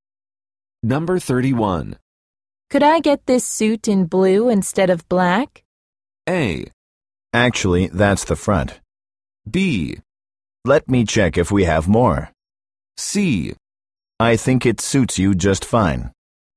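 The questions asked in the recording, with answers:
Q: Could I get this suit in blue instead of black?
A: B: Let me check if we have more.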